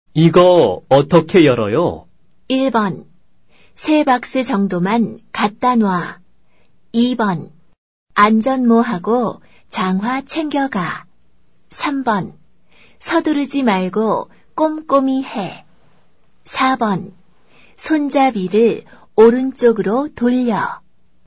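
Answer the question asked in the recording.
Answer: 4: 손잡이를 오른쪽으로 돌려.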